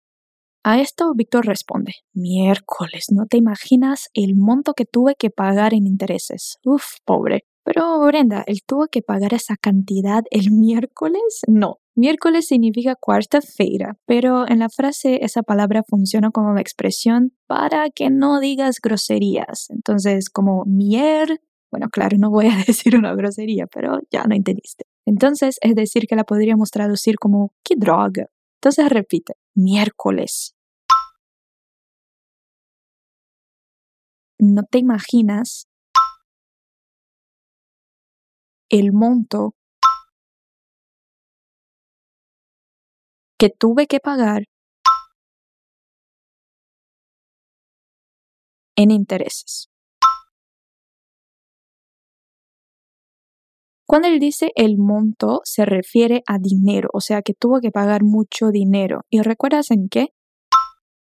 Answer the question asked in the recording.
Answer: En intereses.